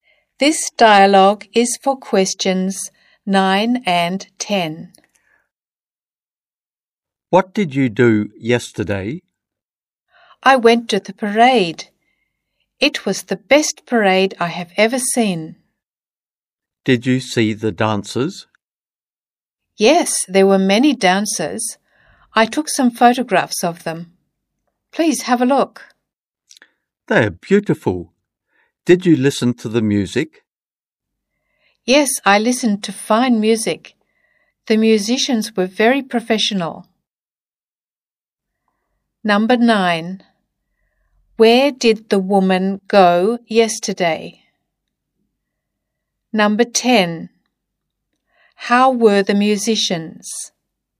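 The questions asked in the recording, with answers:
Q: Where did the woman go yesterday?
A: To the parade

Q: How were the musicians?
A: Very professional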